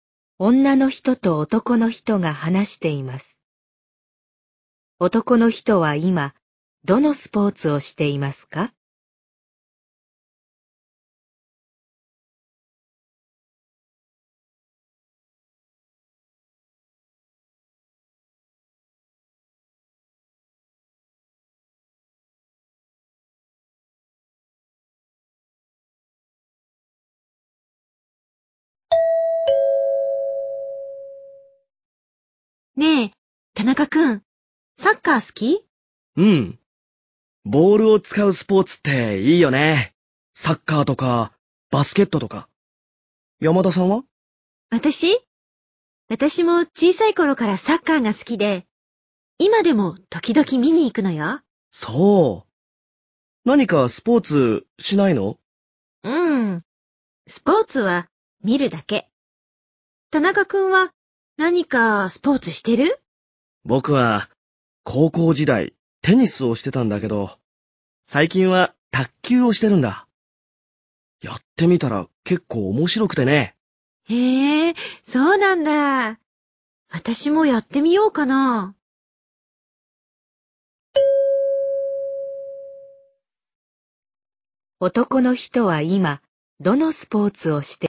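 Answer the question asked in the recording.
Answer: 卓球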